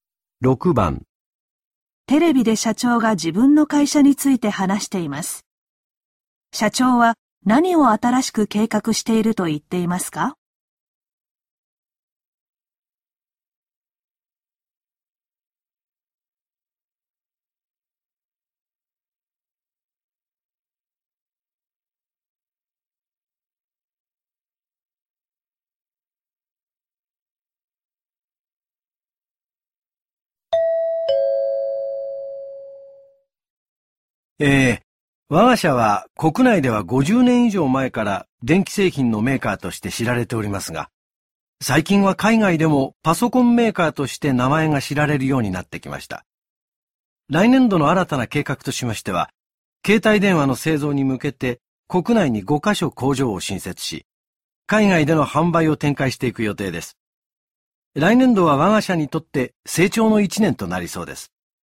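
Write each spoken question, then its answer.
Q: 社長は何を新しく計画していると言っていますか?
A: 国内に携帯電話の工場を5カ所新設し海外で販売する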